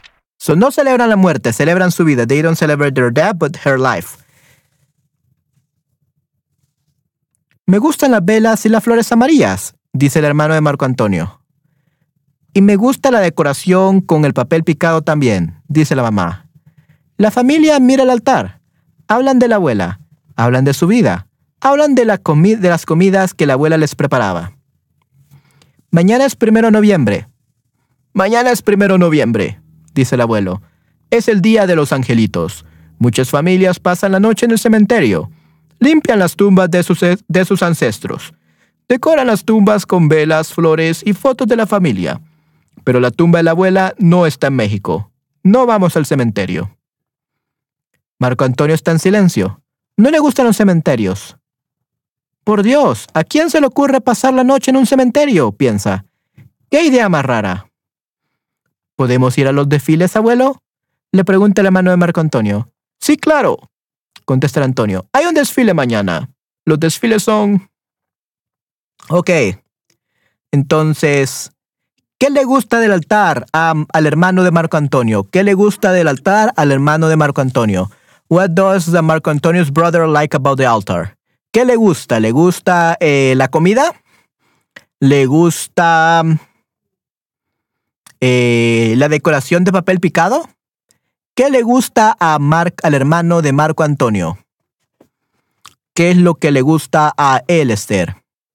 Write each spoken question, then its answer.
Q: ¿Qué le gusta del altar al hermano de Marco Antonio?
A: Aquí dice Esther, me gustan las velas y las flores amarillas.